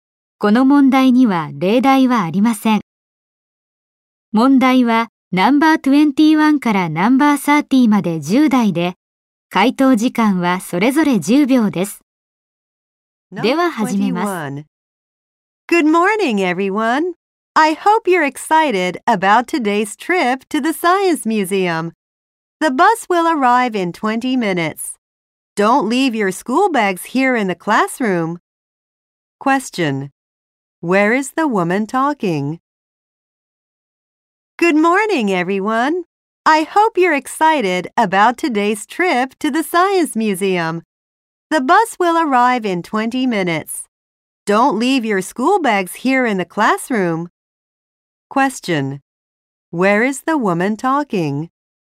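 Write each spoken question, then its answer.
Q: Where is the woman talking?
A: In a classroom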